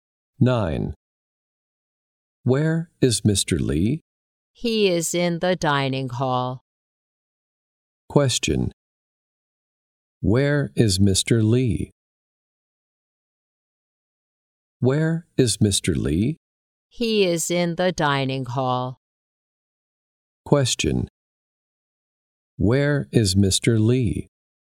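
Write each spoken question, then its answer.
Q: Where is Mr. Lee?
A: In the dining hall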